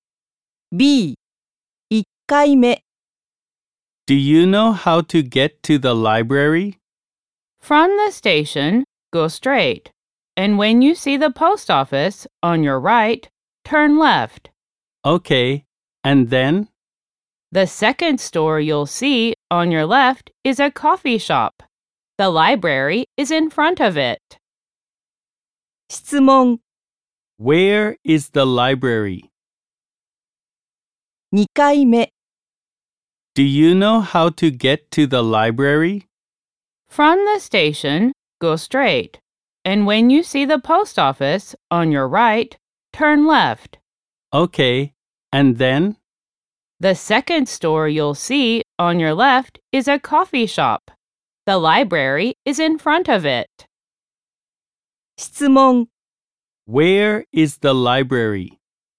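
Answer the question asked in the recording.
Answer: In front of the coffee shop (the second store on the left after turning left at the post office)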